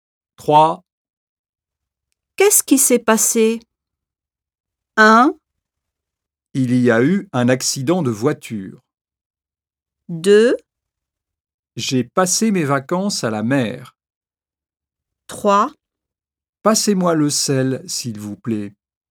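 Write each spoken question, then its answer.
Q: Qu'est-ce qui s'est passé?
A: 1: Il y a eu un accident de voiture.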